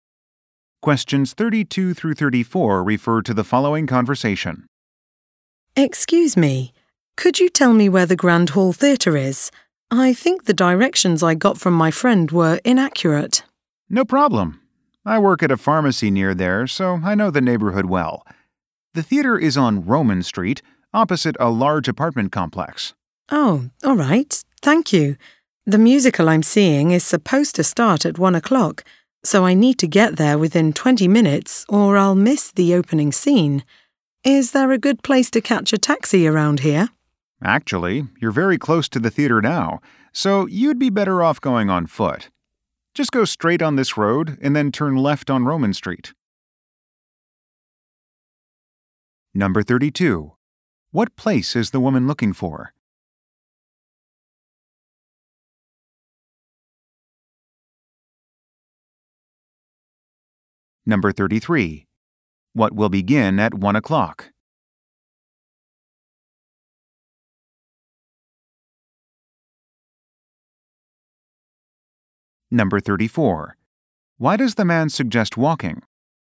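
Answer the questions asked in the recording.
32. The Grand Hall Theatre
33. A musical
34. The theater is very close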